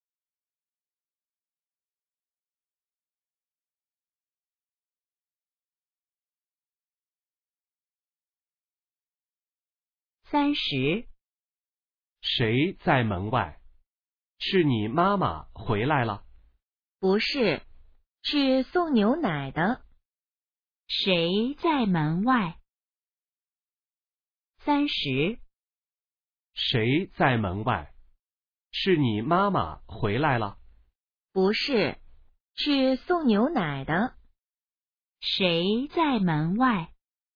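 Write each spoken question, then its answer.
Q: 谁在门外?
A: 送牛奶的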